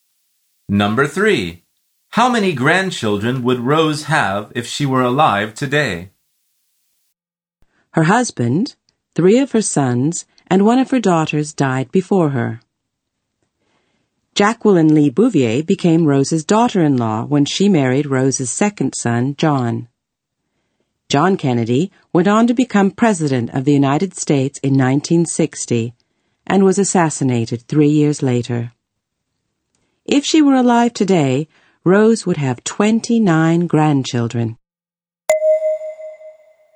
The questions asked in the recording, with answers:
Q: How many grandchildren would Rose have if she were alive today?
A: The answer is 29.